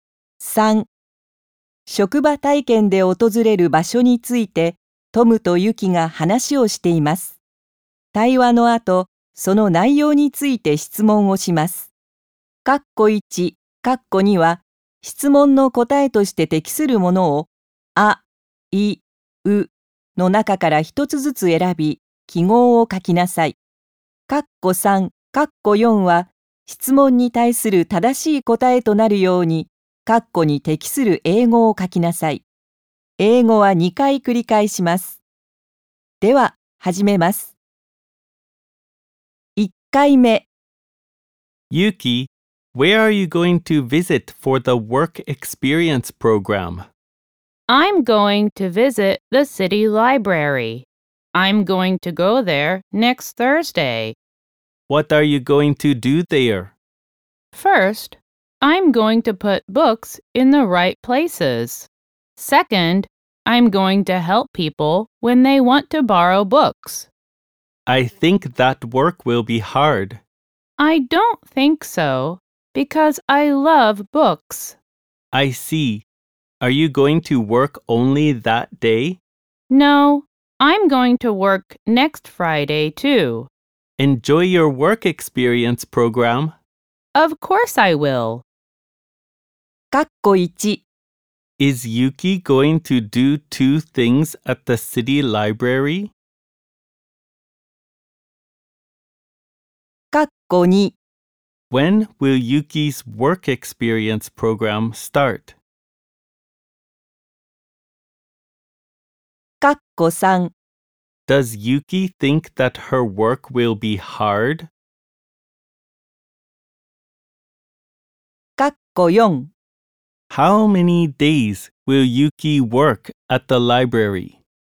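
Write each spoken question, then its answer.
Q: Is Yuki going to do 2 things at the city library?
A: Yes, she is.

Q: When will Yuki's work experience program start?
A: Next Thursday.

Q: Does Yuki think that her work will be hard?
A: No, she doesn't.

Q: How many days will Yuki work at the library?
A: Two days.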